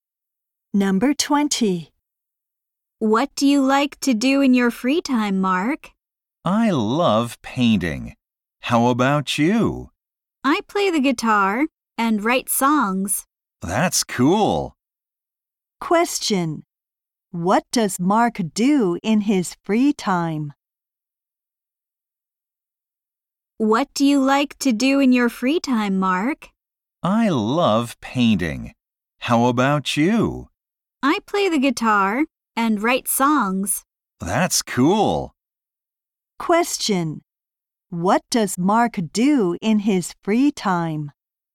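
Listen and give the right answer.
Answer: He paints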